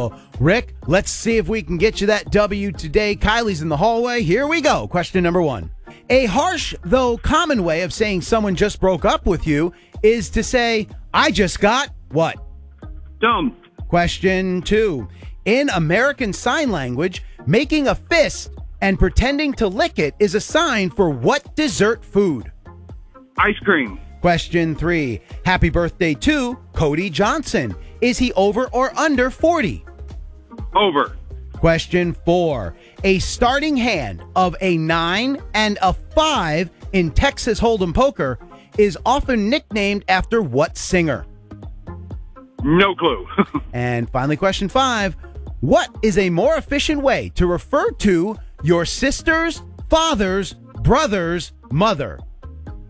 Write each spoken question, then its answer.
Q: A harsh, though common way of saying someone just broke up with you is to say, I just got what?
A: Yes, score is 1-1.

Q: In American Sign Language, making a fist and pretending to lick it is a sign for what dessert food?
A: Yes.